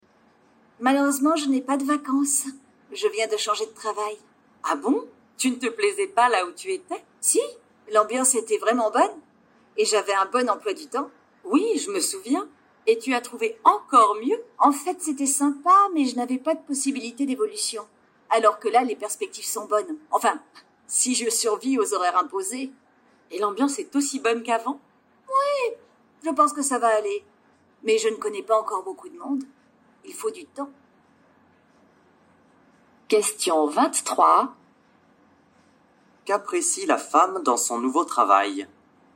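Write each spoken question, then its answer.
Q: Qu'apprécie la femme dans son nouveau travail ?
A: Les perspectives d'évolution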